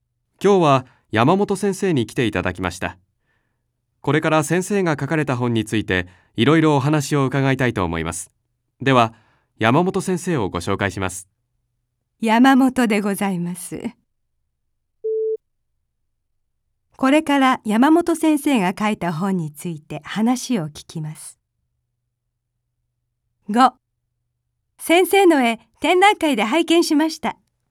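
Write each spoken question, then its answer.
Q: これから山本先生が書いた本について話を聞きます。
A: ○(正しい)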